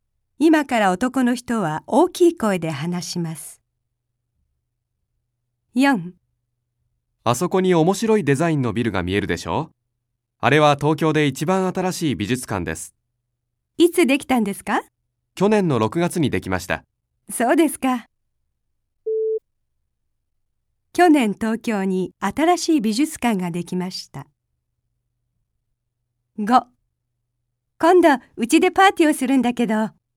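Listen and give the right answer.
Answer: ○(正しい)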